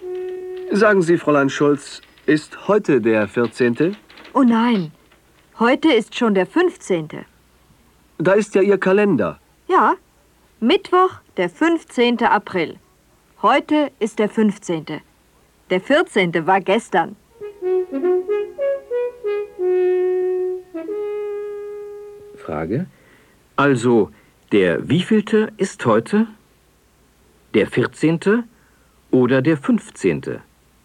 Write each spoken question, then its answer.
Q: Also, der wievielte ist heute? Der 14. oder der 15.?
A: Heute ist der 15.